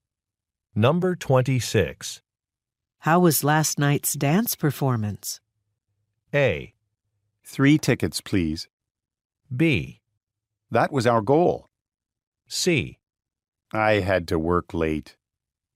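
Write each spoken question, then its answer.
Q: How was last night's dance performance?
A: C: I had to work late.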